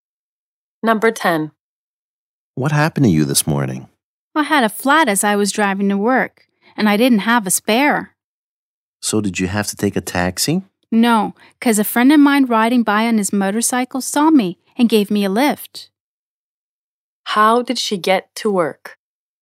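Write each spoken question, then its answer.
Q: How did she get to work?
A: A friend gave her a lift on his motorcycle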